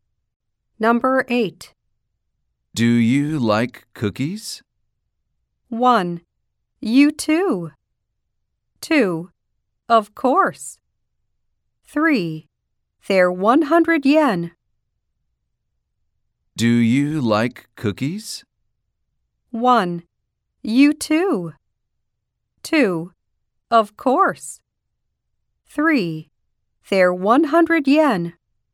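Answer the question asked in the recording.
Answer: 2: Of course.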